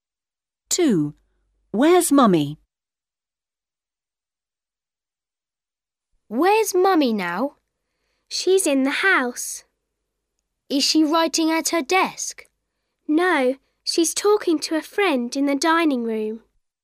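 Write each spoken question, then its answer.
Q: Where's Mummy?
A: In the dining room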